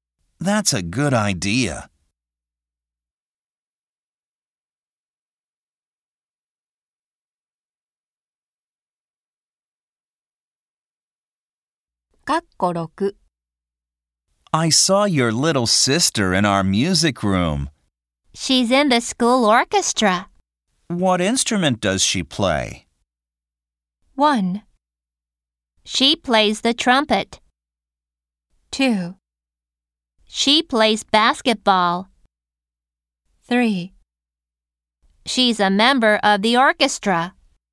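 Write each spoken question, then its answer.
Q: What instrument does she play?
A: 1: She plays the trumpet.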